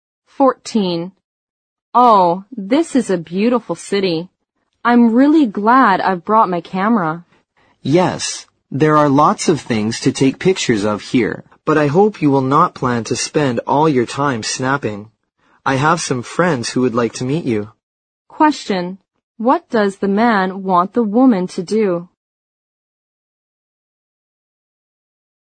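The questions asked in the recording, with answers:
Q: What does the man want the woman to do?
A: Not spend all her time taking pictures, and meet his friends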